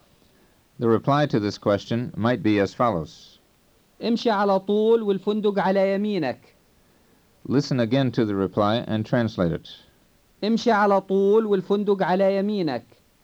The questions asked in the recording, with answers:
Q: Listen again to the reply and translate it.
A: It means go straight ahead and the hotel is on your right.